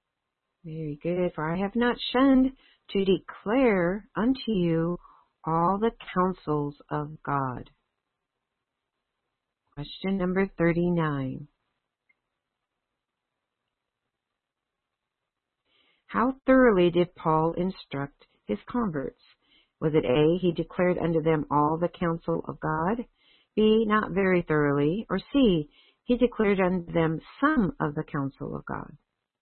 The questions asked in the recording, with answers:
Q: How thoroughly did Paul instruct his converts?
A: Very good. The answer is A, he declared to them all the counsel of God.